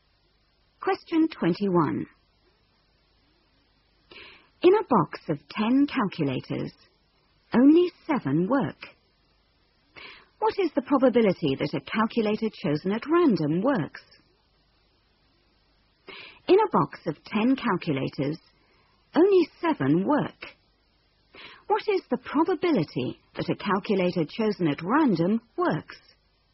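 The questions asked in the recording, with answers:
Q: What is the probability that a calculator chosen at random works?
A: 7/10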